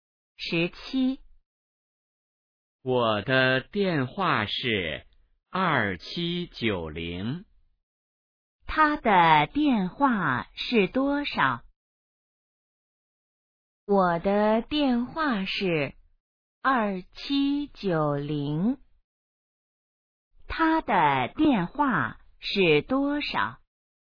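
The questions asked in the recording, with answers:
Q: 他的电话是多少?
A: 2790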